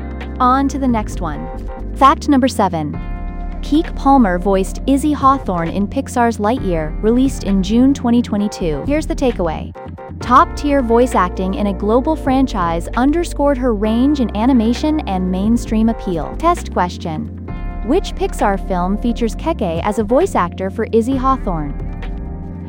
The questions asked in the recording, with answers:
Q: which Pixar film features Keke as a voice actor for Izzy Hawthorne?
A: Lightyear.